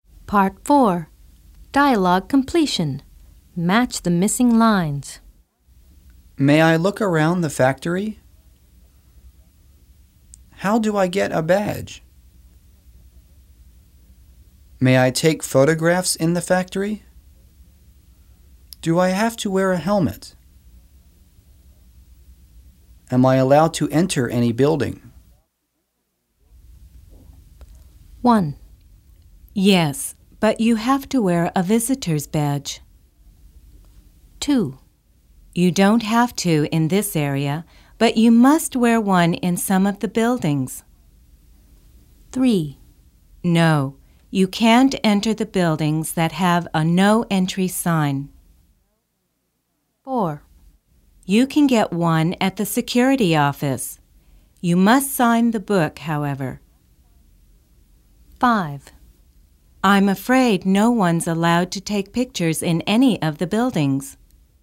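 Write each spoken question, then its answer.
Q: Yes, but you have to wear a visitor's badge.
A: May I look around the factory?

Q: You don't have to in this area, but you must wear one in some of the buildings.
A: Do I have to wear a helmet?

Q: No, you can't enter the buildings that have a no entry sign.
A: Am I allowed to enter any building?

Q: You can get one at the security office.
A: How do I get a badge?

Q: I'm afraid no one's allowed to take pictures in any of the buildings.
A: May I take photographs in the factory?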